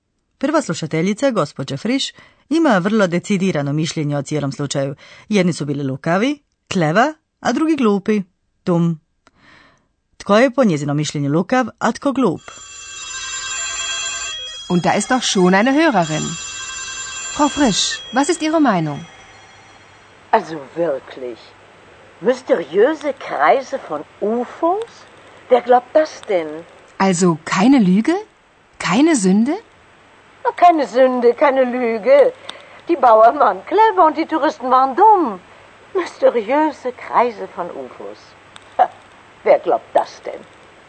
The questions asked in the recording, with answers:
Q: Tko je po njezinom mišljenju lukav, a tko glup?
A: Prema mišljenju gospođe Friš, seljaci Bauern bili su lukavi, a turisti glupi.